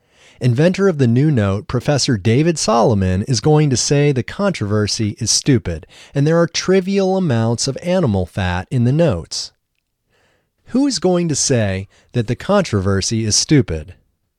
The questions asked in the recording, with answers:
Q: Who is going to say that the controversy is stupid?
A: Professor David Solomon is going to say the controversy is stupid.